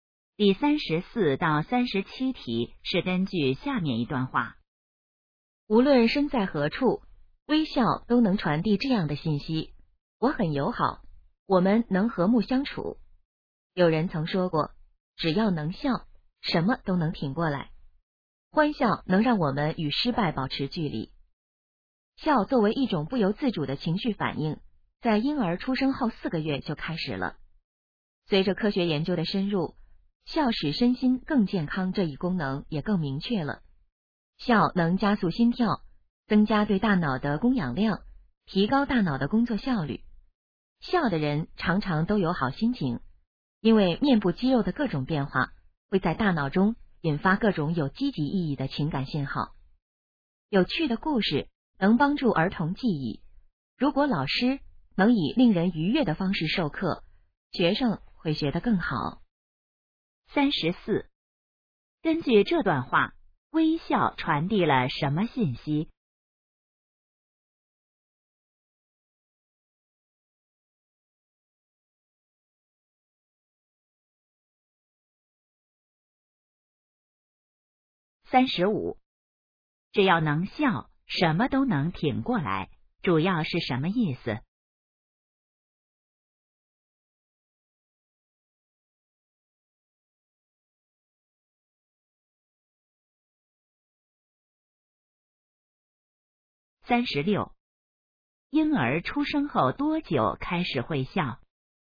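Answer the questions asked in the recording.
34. 我很友好,我们能和睦相处
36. 4个月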